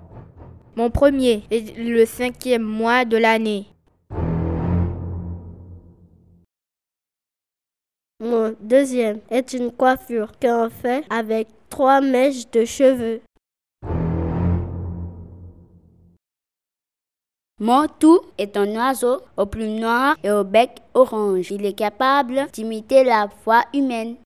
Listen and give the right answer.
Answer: le ménat.